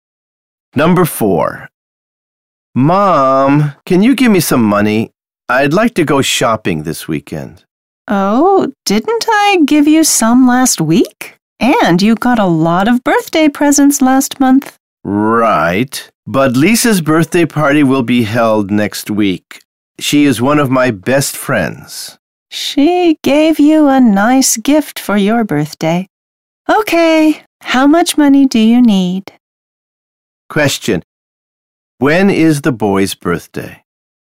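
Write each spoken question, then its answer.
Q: When is the boy's birthday?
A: Last month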